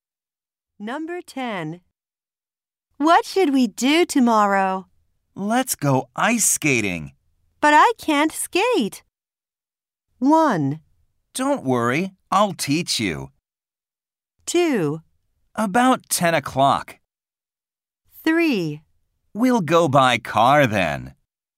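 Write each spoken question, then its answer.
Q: But I can't skate.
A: 1: Don't worry, I'll teach you.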